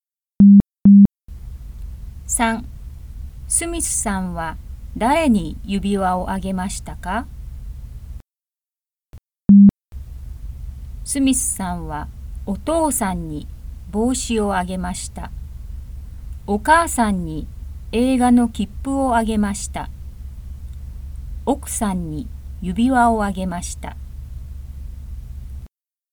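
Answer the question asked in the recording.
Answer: 奥さん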